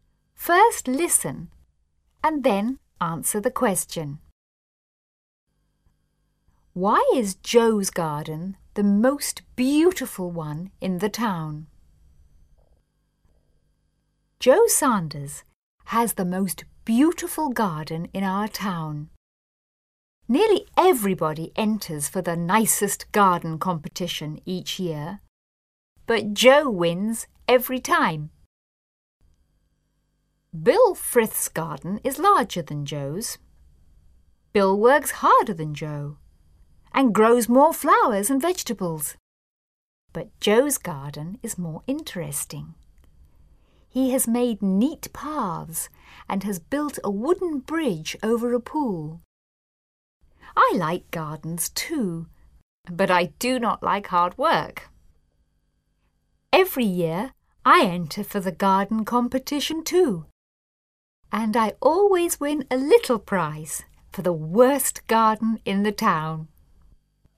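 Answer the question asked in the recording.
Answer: Because it is more interesting: he has made neat paths and built a wooden bridge over a pool.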